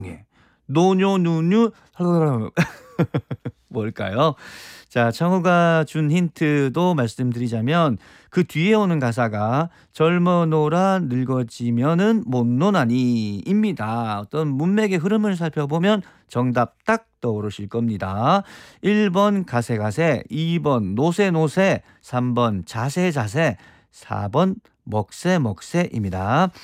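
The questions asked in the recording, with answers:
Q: 노뇨누뉴 뭘까요?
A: 2번: 노세노세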